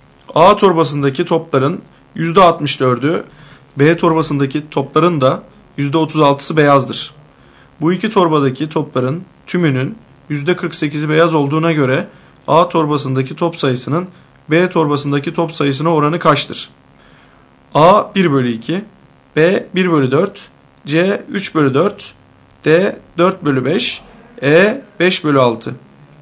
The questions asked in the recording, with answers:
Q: Bu iki torbadaki topların tümünün %48'i beyaz olduğuna göre A torbasındaki top sayısının B torbasındaki top sayısına oranı kaçtır?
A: Doğru cevap C 3 bölü 4.